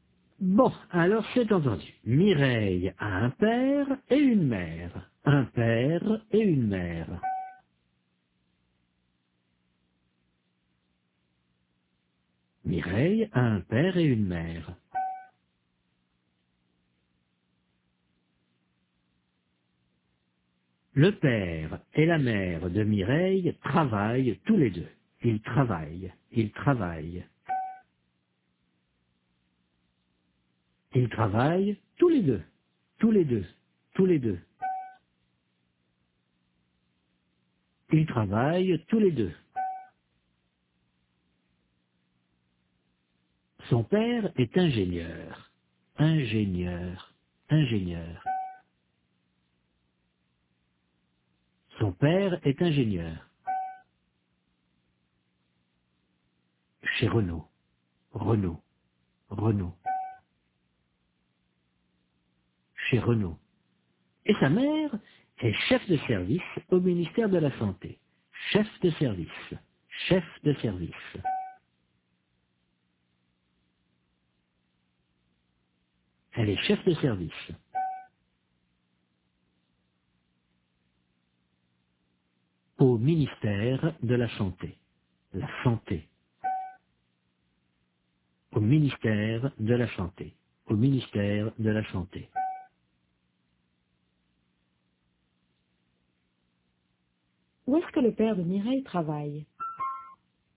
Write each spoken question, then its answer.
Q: Où est-ce que le père de Mireille travaille ?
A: Chez Renault.